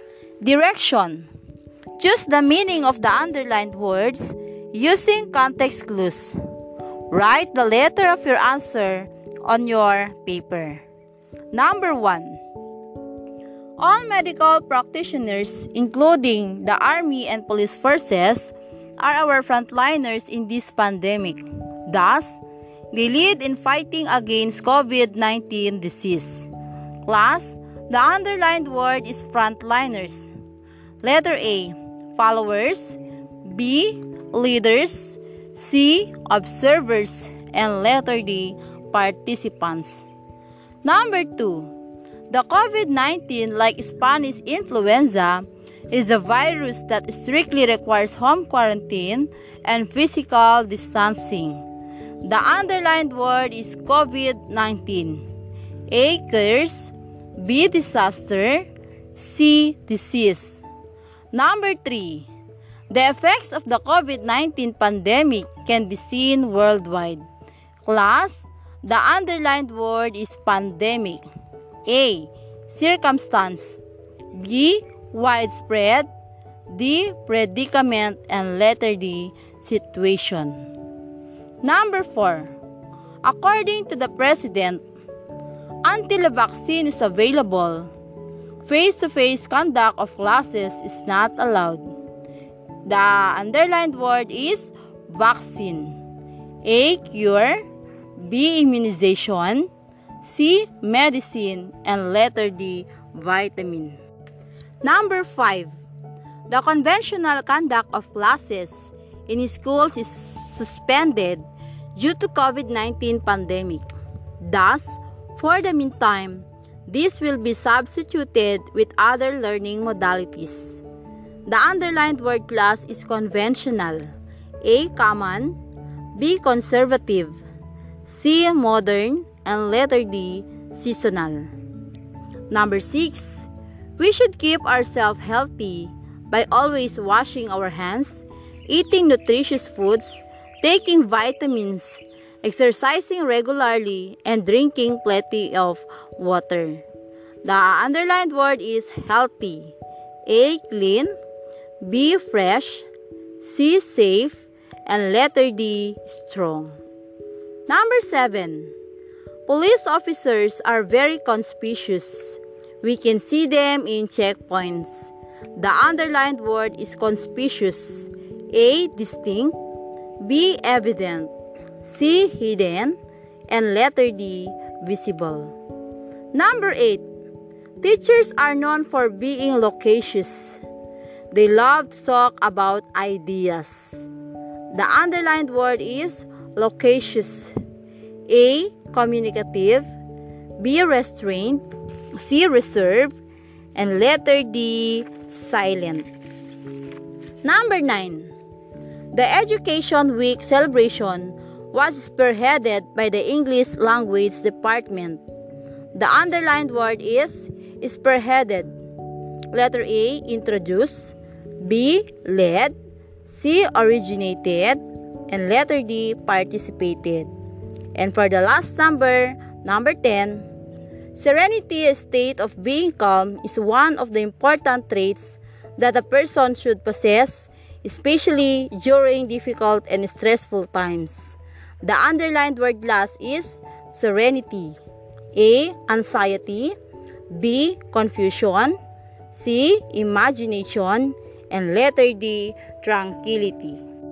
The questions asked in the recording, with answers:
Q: Class, the underlined word is frontliners.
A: So the correct answer is letter B, leaders.

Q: The underlined word is COVID-19. A, curse.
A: So the correct answer is letter C.

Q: Class, the underlined word is pandemic.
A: Okay, it's letter B, widespread.

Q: The underlined word is vaccine.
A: So the correct answer is letter B, immunization.

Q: The underlined word is conspicuous.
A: Okay, the correct answer is letter D, very good.

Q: The underlined word is loquacious.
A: Okay, very good. The correct answer is letter A, communicative.

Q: The underlined word is spearheaded.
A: Okay, very good. The correct answer is letter B, led.

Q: The underlined word last is serenity.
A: Okay, the correct answer is letter D, tranquility.